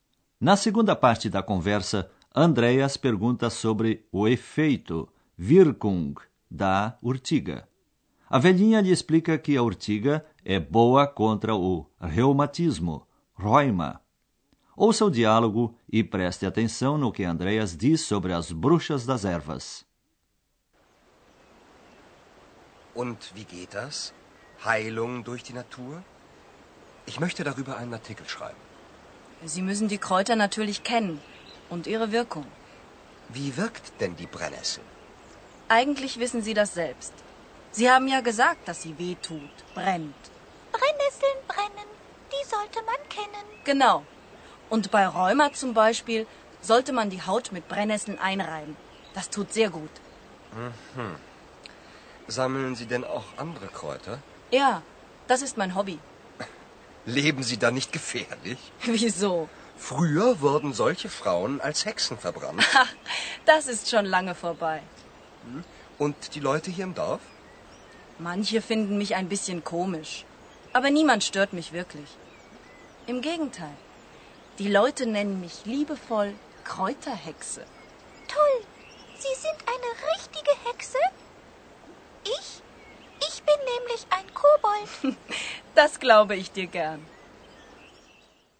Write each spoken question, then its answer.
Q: Ouça o diálogo e preste atenção no que Andreas diz sobre as bruxas das ervas.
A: Andréas leu que, antigamente, as mulheres que colhiam ervas eram queimadas como bruxas, por se acreditar que elas possuíam poderes mágicos.